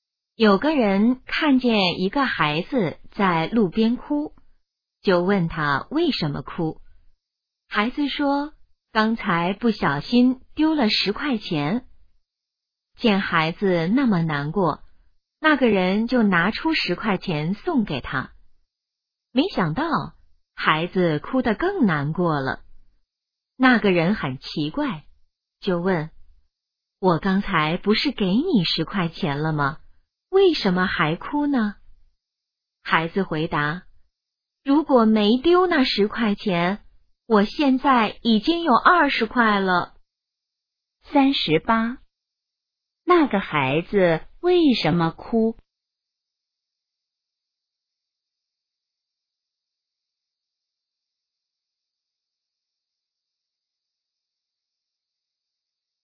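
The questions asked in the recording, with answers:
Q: 那个孩子为什么哭?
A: 丢了10块钱

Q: 那个孩子现在有多少钱?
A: 10块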